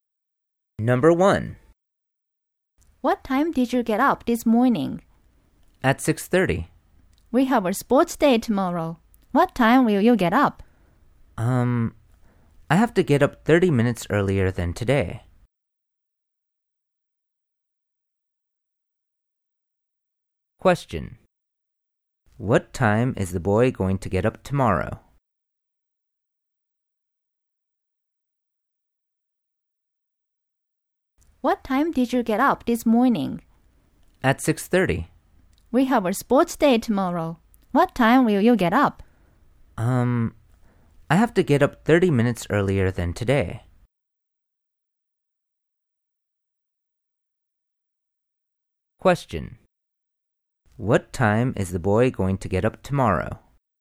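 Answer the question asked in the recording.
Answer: At 6:00.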